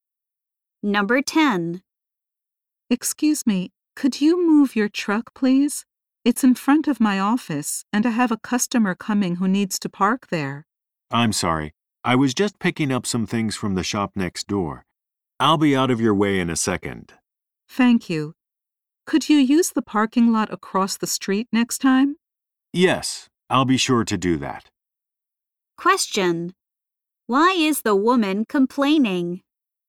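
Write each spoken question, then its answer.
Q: Why is the woman complaining?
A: The man's truck is parked in front of her office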